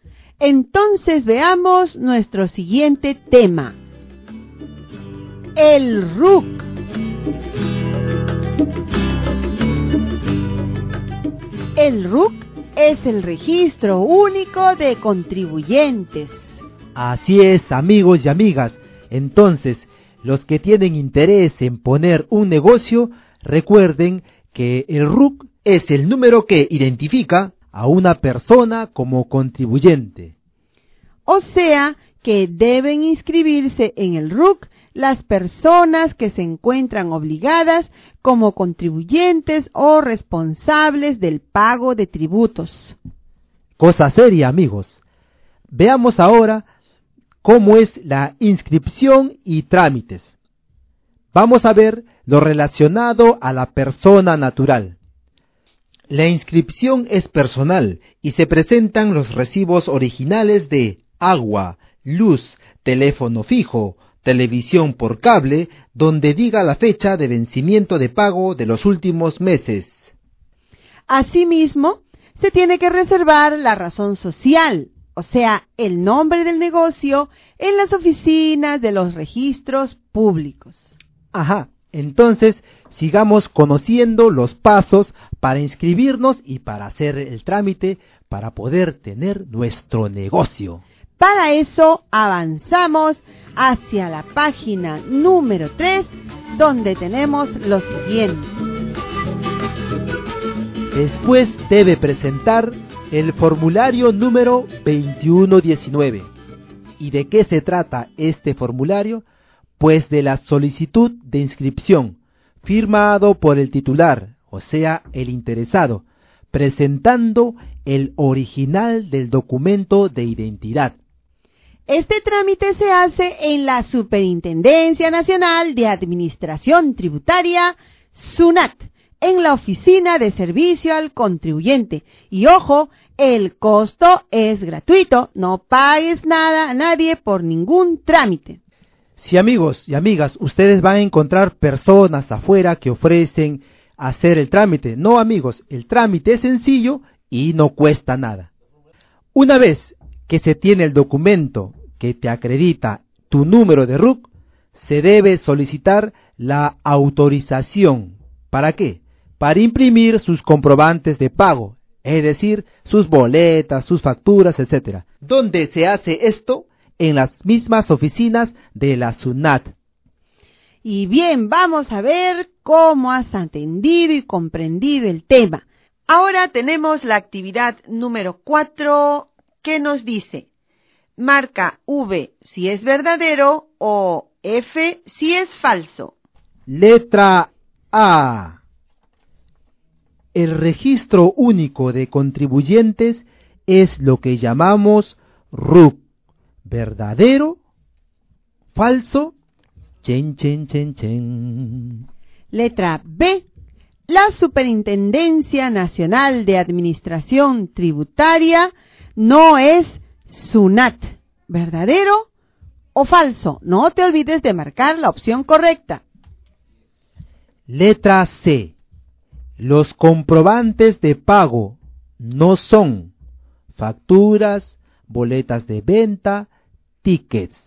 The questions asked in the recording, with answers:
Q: El registro único de contribuyentes es lo que llamamos RUC.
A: Respuesta verdadera.

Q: La Superintendencia Nacional de Administración Tributaria no es SUNAT.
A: ¡Falso!

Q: Los comprobantes de pago no son facturas, boletas de venta, tickets.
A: La respuesta es falso.